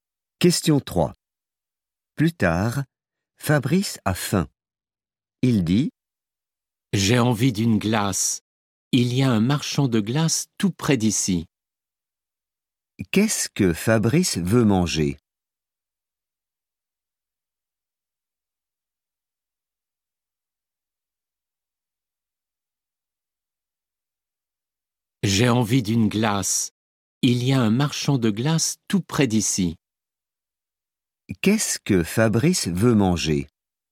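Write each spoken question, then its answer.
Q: Qu'est-ce que Fabrice veut manger?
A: une glace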